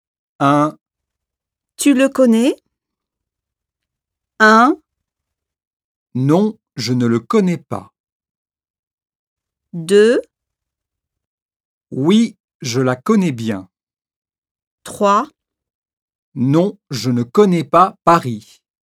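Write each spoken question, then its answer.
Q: Tu le connais?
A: 1: Non, je ne le connais pas.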